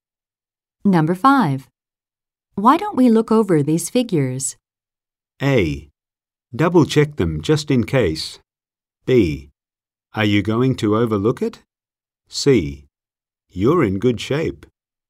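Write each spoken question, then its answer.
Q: Why don't we look over these figures?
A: A: Double check them just in case.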